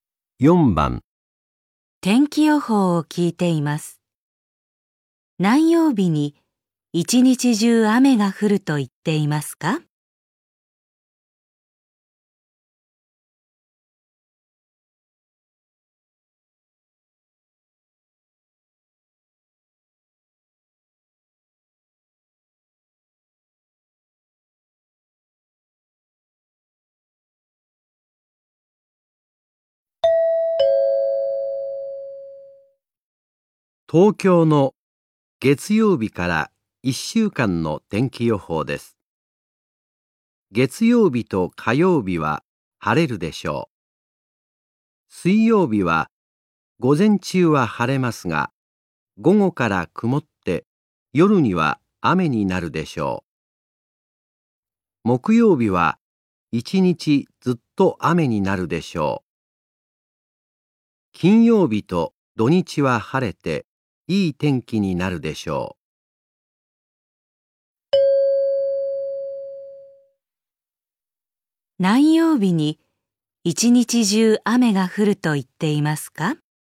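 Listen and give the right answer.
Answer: 木曜日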